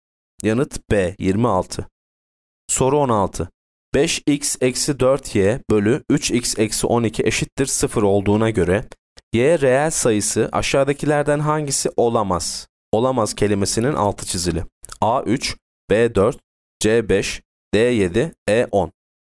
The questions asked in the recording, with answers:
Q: 5x eksi 4y bölü 3x eksi 12 eşittir 0 olduğuna göre y reel sayısı aşağıdakilerden hangisi olamaz?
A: Yanıt C 5.